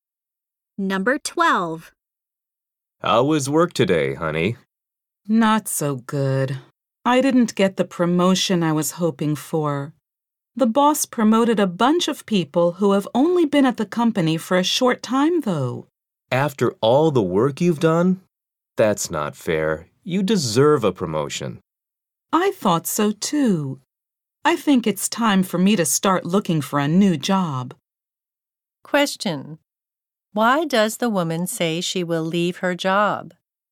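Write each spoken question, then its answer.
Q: Why does the woman say she will leave her job?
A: She didn't get the promotion she hoped for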